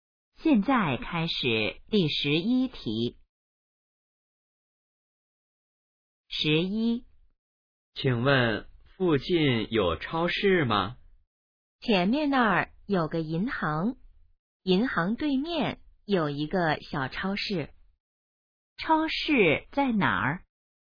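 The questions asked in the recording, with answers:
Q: 超市在哪儿?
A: 银行对面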